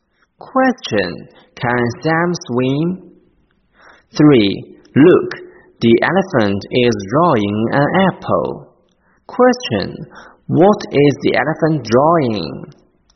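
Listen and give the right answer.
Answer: An apple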